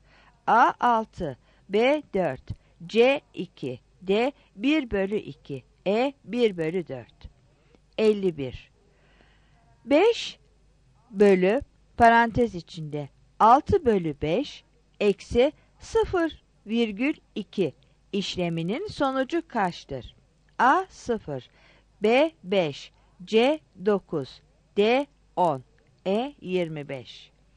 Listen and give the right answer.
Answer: 51 B